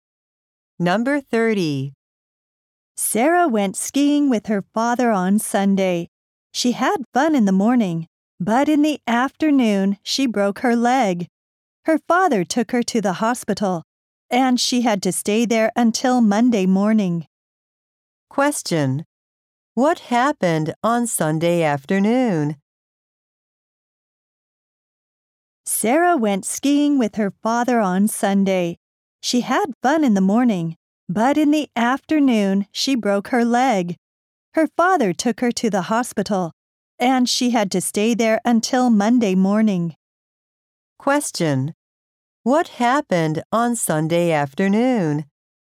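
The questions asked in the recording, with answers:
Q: What happened on Sunday afternoon?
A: Sarah broke her leg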